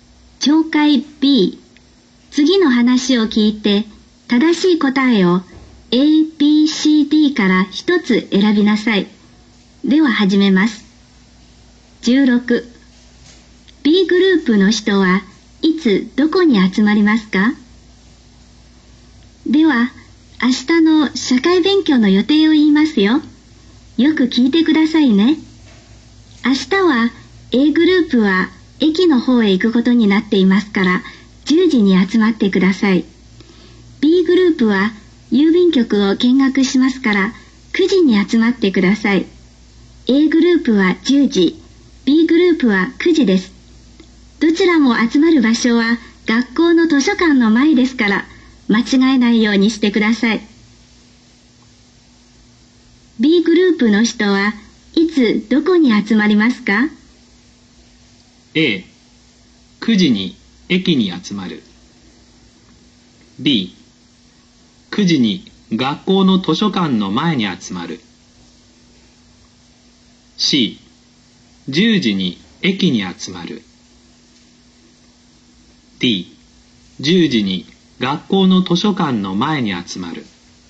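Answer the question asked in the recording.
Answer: B: 9時に学校の図書館の前に集まる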